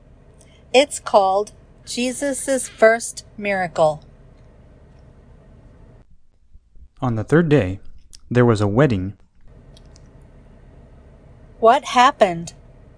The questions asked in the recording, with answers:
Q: What happened?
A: A wedding. There was a wedding.